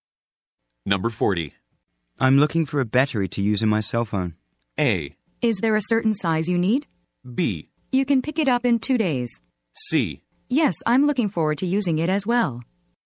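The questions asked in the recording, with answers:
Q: I'm looking for a battery to use in my cell phone.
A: A: Is there a certain size you need?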